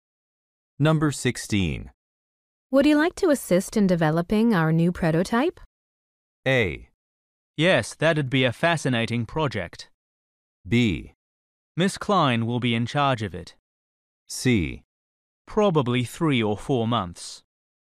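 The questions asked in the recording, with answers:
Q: Would you like to assist in developing our new prototype?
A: A: Yes, that'd be a fascinating project.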